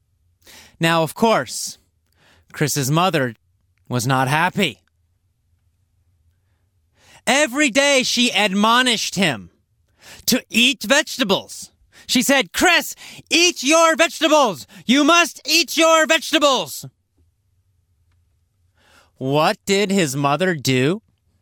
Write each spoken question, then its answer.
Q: What did his mother do?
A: She admonished Chris.